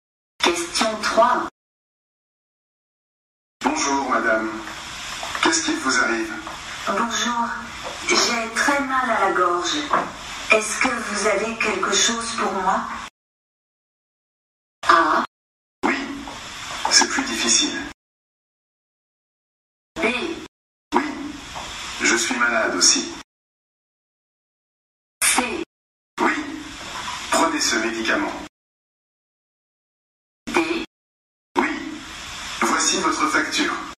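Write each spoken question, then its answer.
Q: Est-ce que vous avez quelque chose pour moi?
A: C: Oui, prenez ce médicament.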